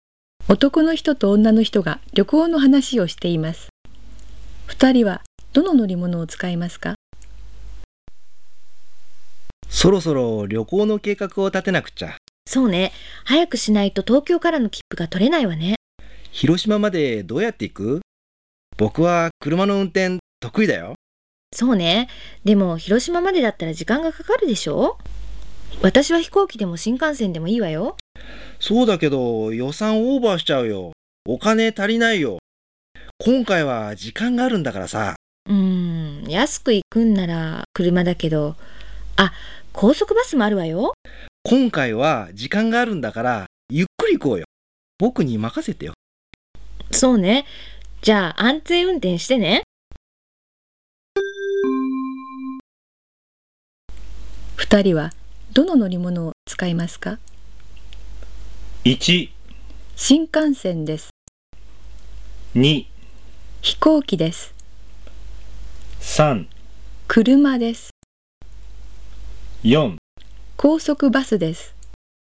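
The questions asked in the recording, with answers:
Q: 二人はどの乗り物を使いますか?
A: 3: 車です。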